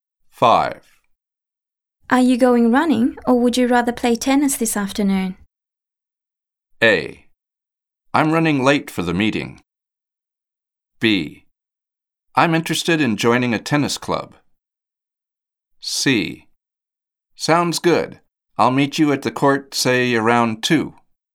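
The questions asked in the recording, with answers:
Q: Are you going running, or would you rather play tennis this afternoon?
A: C: Sounds good. I'll meet you at the court, say, around 2.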